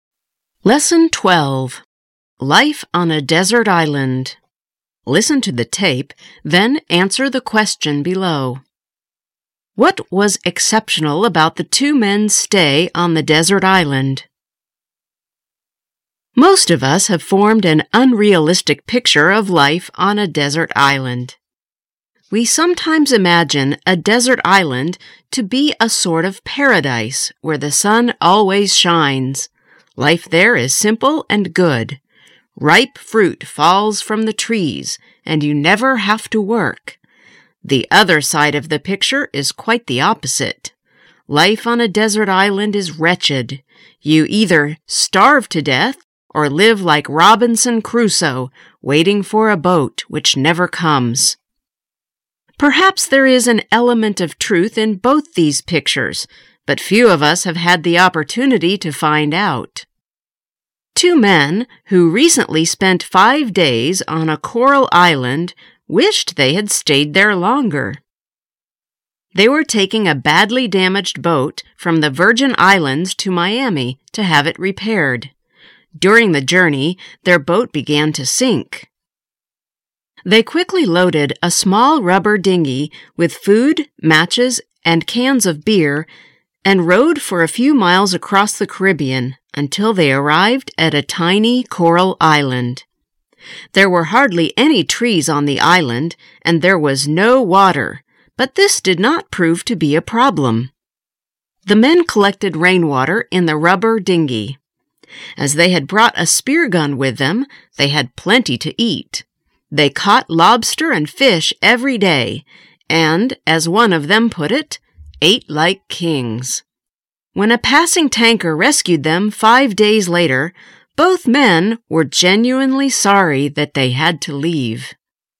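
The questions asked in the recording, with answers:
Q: What was exceptional about the two men's stay on the desert island?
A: They enjoyed it and wished they had stayed longer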